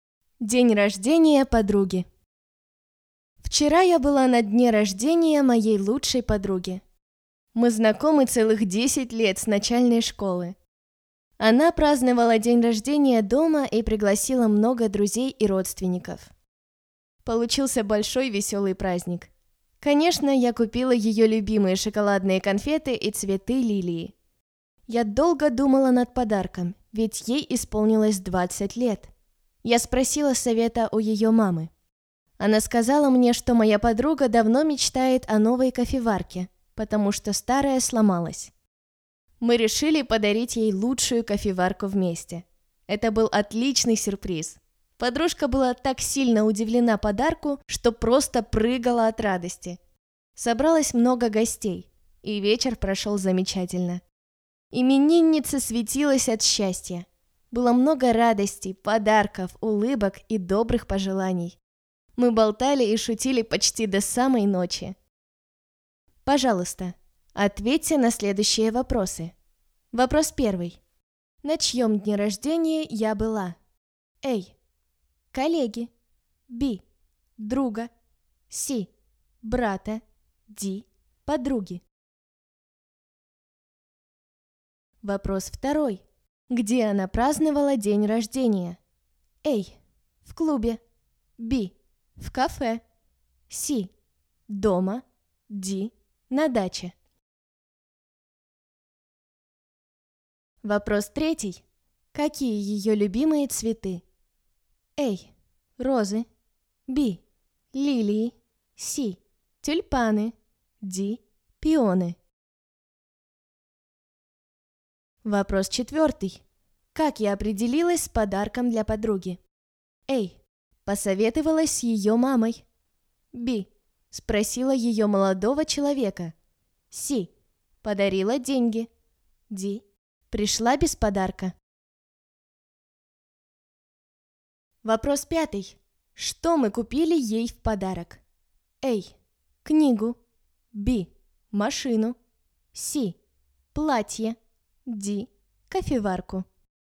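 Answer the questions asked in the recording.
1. D: Подруги
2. C: Дома
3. B: Лилии
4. A: Посоветовалась с ее мамой
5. D: Кофеварку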